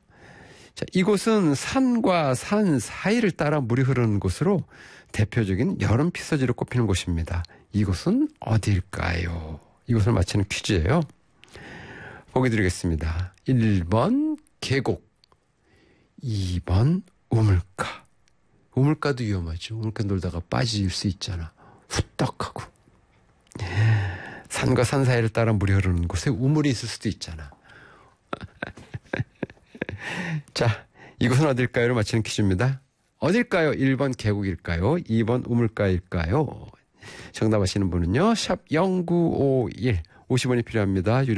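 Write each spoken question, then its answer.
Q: 이곳은 어딜까요?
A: 1번: 계곡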